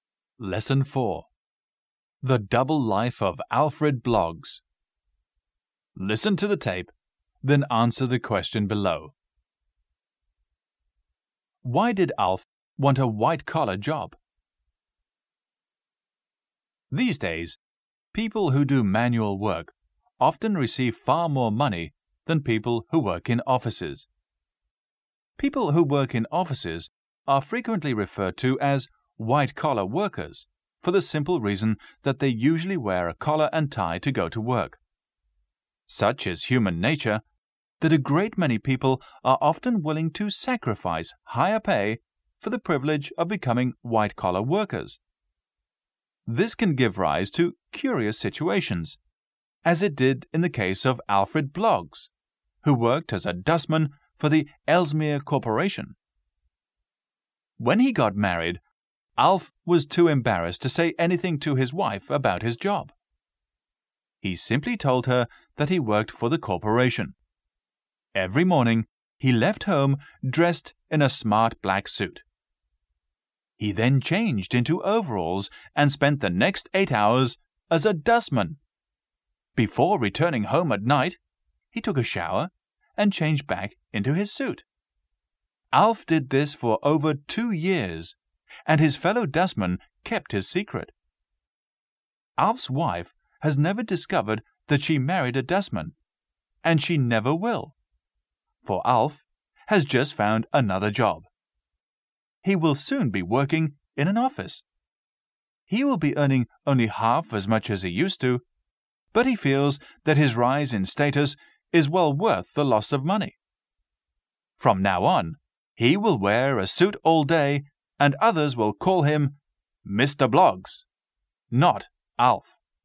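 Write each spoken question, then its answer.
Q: Why did Alf want a white-collar job?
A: He felt the rise in status was worth the loss of money (he was embarrassed to be a dustman).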